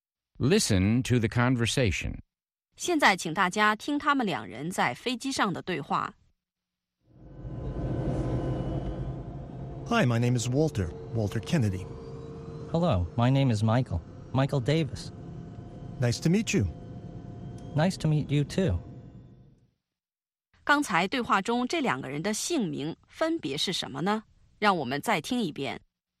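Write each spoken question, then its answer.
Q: 刚才对话中这两个人的姓名分别是什么呢?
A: Walter Kennedy 和 Michael Davis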